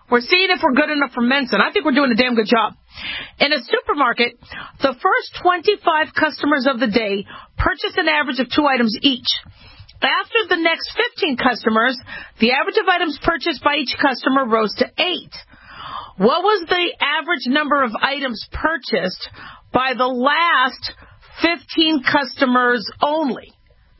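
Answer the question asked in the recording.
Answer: 18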